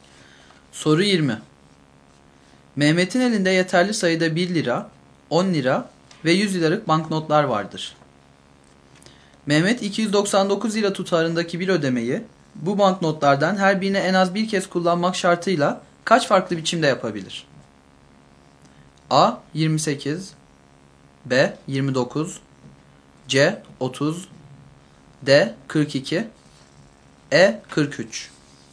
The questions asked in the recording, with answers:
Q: Mehmet 299 lira tutarındaki bir ödemeyi bu banknotlardan her birini en az bir kez kullanmak şartıyla kaç farklı biçimde yapabilir?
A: Doğru yanıt A şıkkı.